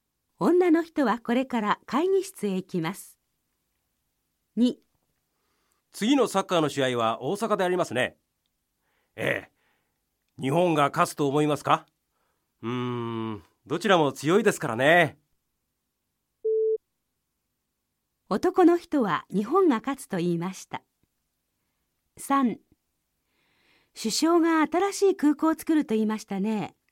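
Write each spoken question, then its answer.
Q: 男の人は日本が勝つと言いました。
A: ×(どちらも強いと言いました)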